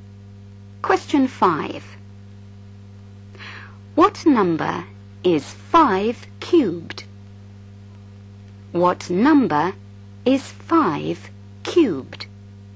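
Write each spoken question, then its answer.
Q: What number is 5 cubed?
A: 125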